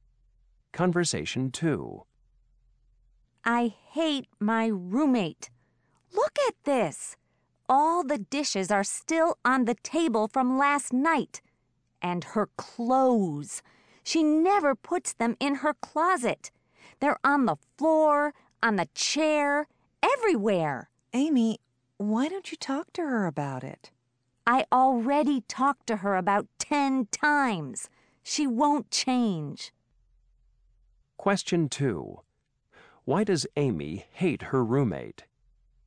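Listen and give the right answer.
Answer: Her roommate is messy and doesn't clean up.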